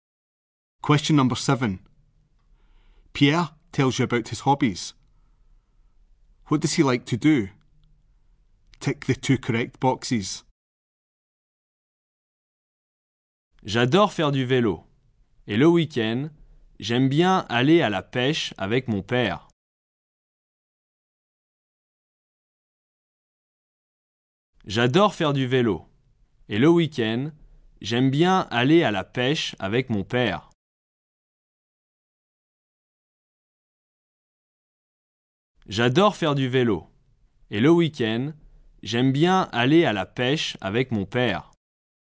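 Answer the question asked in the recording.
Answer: Cycling and fishing (with his father at weekends)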